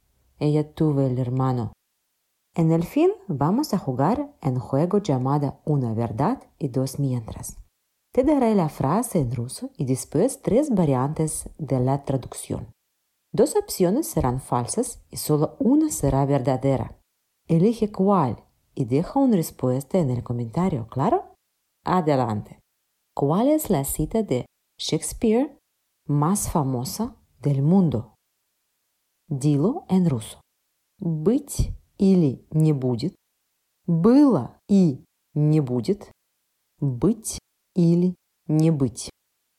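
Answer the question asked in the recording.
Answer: быть или не быть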